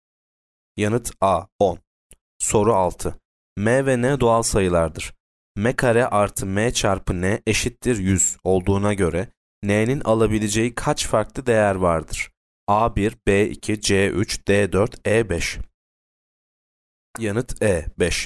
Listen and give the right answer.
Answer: Yanıt E5.